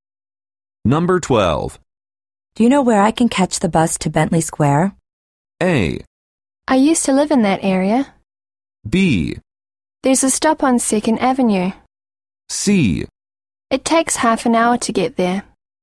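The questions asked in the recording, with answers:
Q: Do you know where I can catch the bus to Bentley Square?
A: B: There's a stop on 2nd Avenue.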